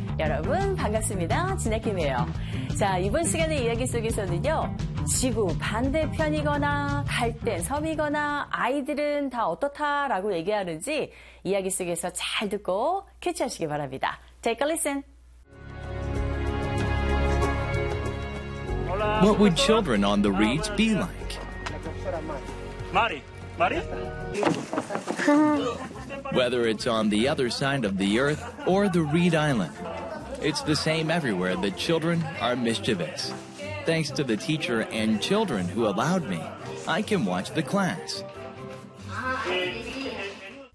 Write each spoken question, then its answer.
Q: 지구 반대편이거나 갈대 섬이거나 아이들은 다 어떻다라고 얘기하는지 이야기 속에서 잘 듣고 캐치하시기 바랍니다.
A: Children are mischievous라고 합니다.